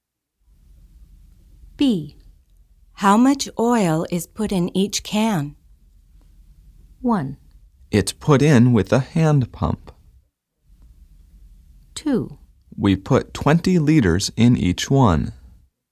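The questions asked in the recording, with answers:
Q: How much oil is put in each can?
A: 2: We put 20 liters in each one.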